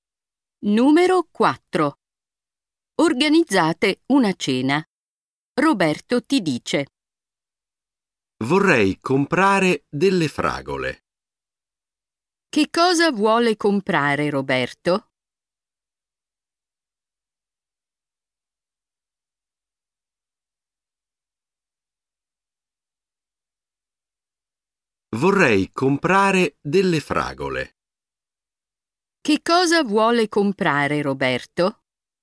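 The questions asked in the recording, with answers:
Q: Che cosa vuole comprare Roberto?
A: Delle fragole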